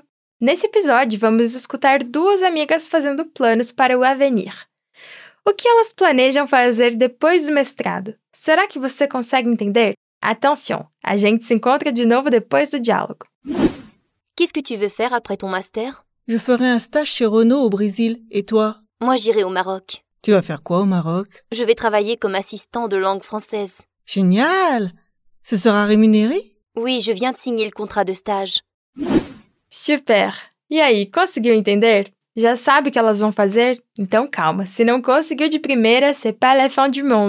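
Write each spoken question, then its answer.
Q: O que elas planejam fazer depois do mestrado?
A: Uma vai fazer um estágio na Renault no Brasil; a outra vai trabalhar como assistente de língua francesa no Marrocos.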